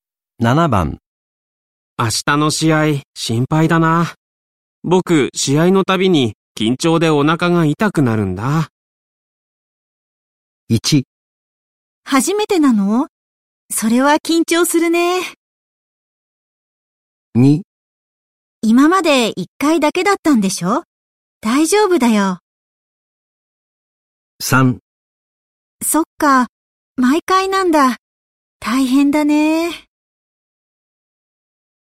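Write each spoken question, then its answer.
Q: 明日の試合心配だな。僕試合のたびに緊張でお腹が痛くなるんだ。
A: 3: そっか、毎回なんだ。大変だね。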